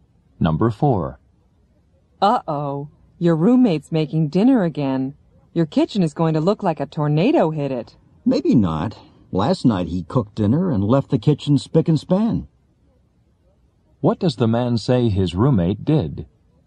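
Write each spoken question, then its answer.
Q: What does the man say his roommate did?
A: He left the kitchen very clean after cooking last night.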